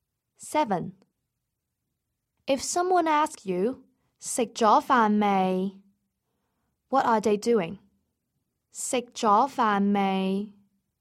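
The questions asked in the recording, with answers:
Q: If someone asks you, 食咗飯未? What are they doing?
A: Asking whether you have eaten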